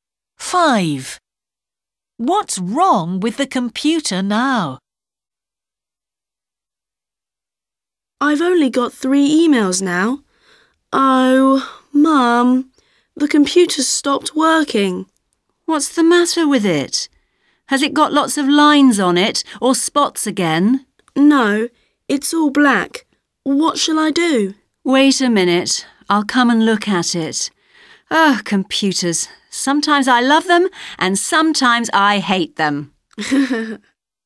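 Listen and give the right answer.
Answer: the screen is all black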